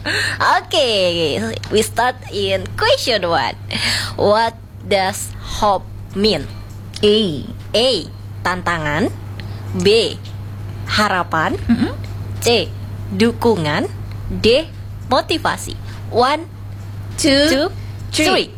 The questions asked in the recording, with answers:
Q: What does hope mean?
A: The answer is B.